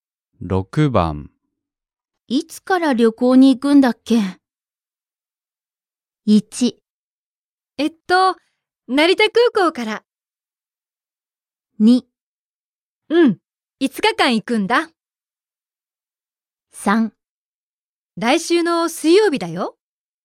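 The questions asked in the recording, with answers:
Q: いつから旅行に行くんだっけ?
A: 3: 来週の水曜日だよ。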